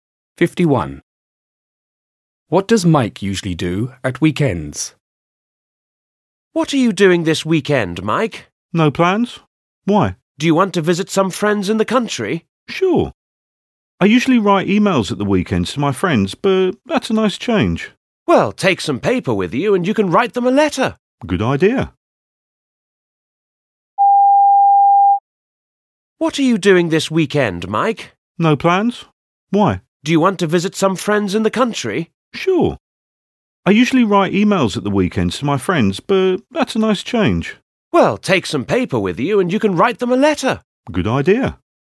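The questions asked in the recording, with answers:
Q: What does Mike usually do at weekends?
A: Writes emails to his friends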